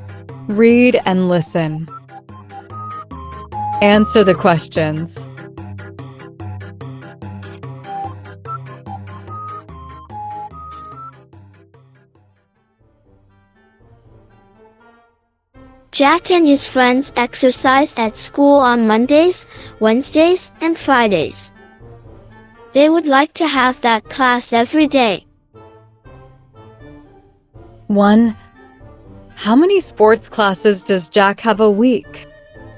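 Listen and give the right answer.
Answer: Three (Mondays, Wednesdays and Fridays)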